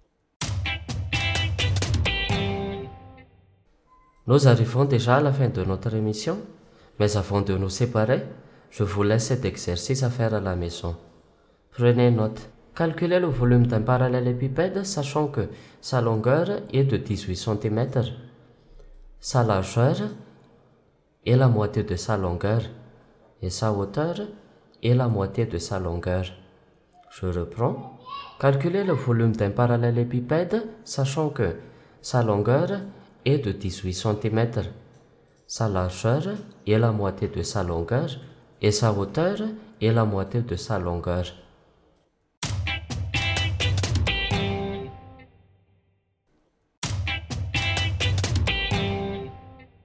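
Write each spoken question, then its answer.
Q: Calculez le volume d'un parallélépipède, sachant que sa longueur est de 18 cm.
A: 1458 cm3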